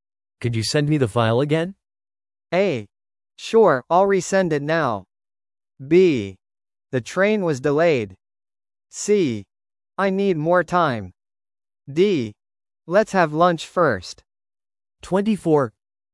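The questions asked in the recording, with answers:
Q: Could you send me the file again?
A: A: Sure, I'll resend it now.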